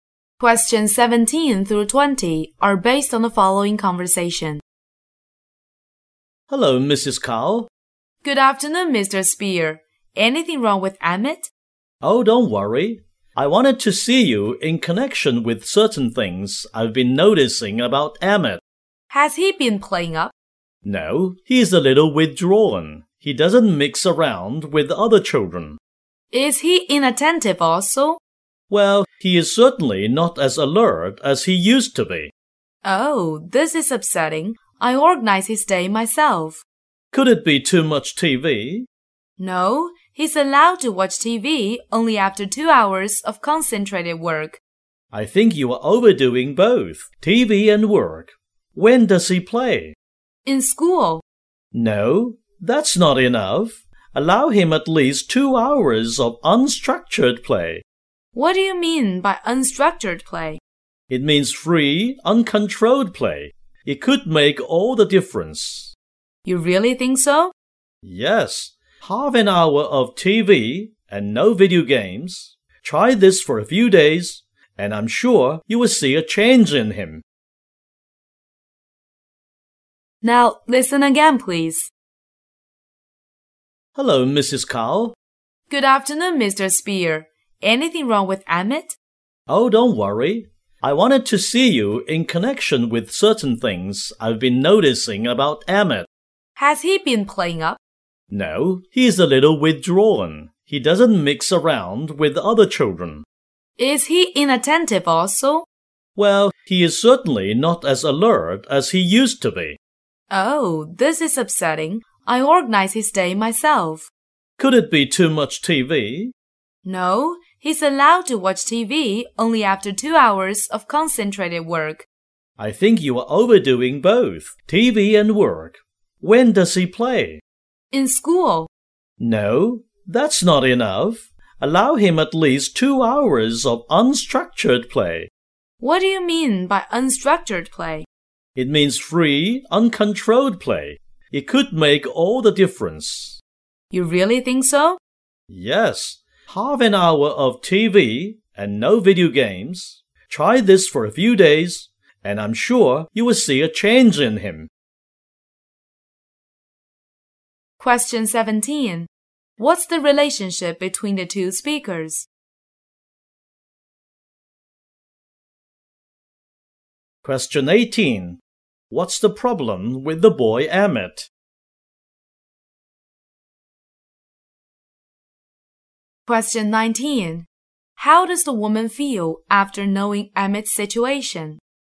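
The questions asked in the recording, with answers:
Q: What's the relationship between the two speakers?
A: Teacher and parent

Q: What's the problem with the boy Emmett?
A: He is withdrawn and less alert than before

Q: How does the woman feel after knowing Emmett's situation?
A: Upset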